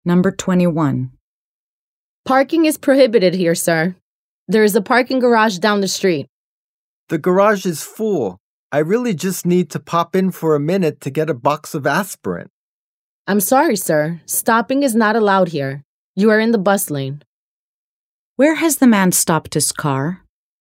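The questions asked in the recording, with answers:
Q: Where has the man stopped his car?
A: In the bus lane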